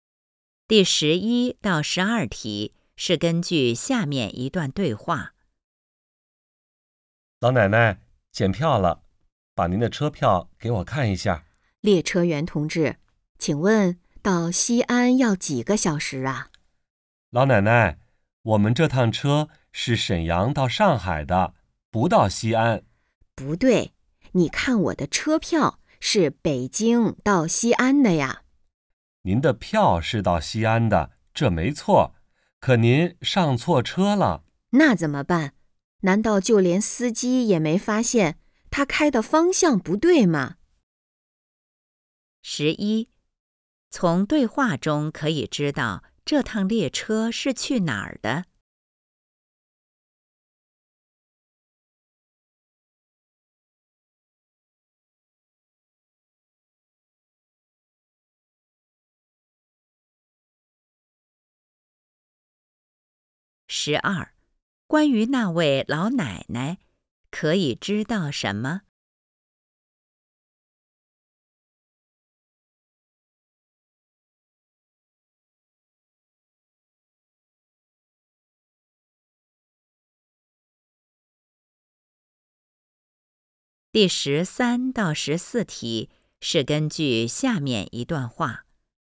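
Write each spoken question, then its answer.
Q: 从对话中可以知道这趟列车是去哪儿的?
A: 上海

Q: 关于那位老奶奶,可以知道什么?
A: 她上错车了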